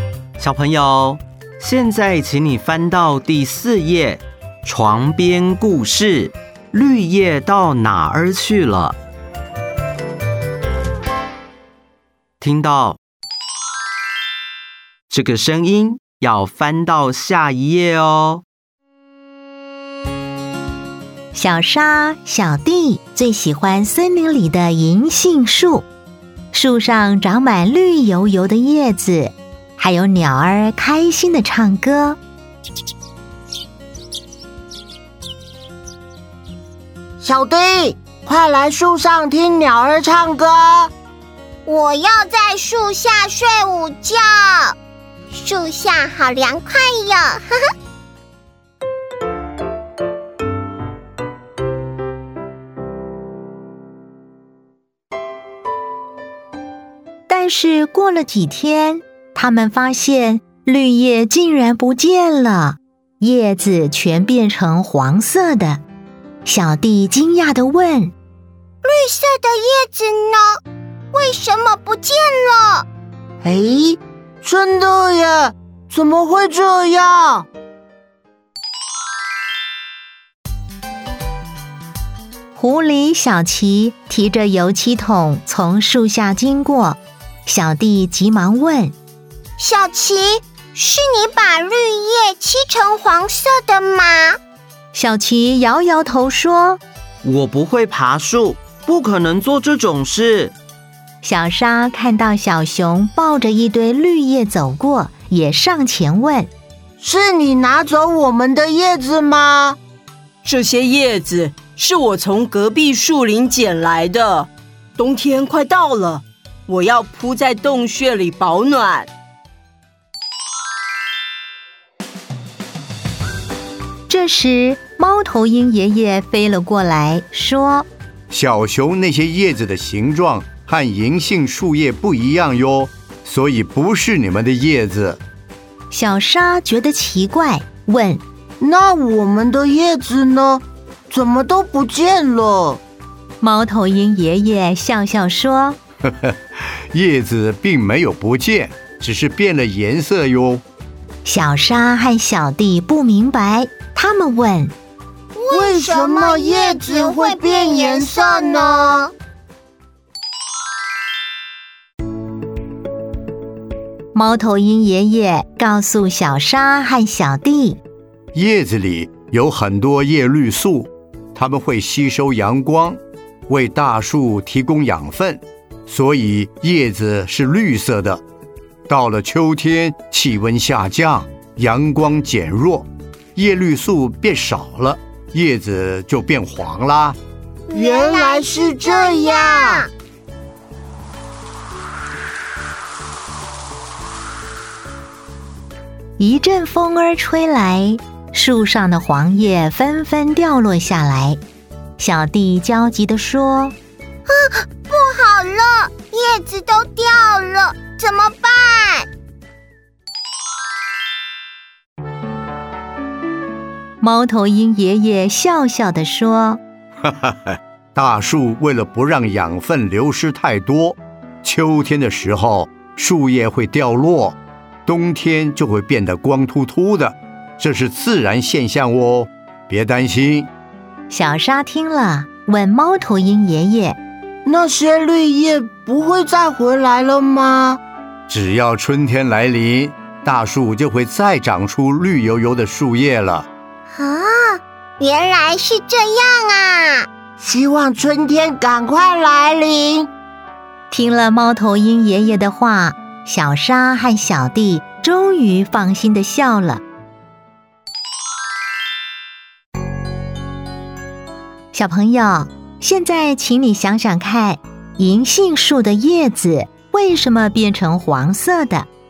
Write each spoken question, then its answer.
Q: 银杏树的叶子为什么变成黄色的?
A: 叶绿素变少了。